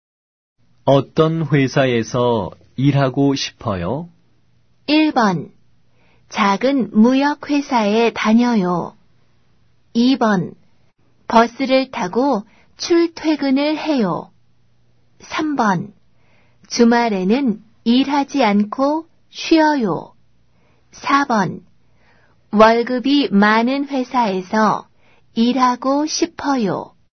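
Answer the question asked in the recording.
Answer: 4: 월급이 많은 회사에서 일하고 싶어요.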